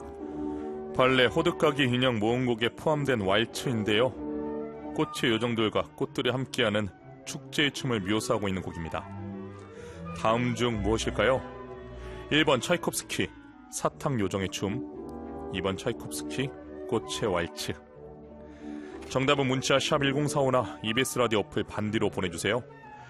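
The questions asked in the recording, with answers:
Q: 다음 중 무엇일까요?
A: 2: 차이콥스키, 꽃의 왈츠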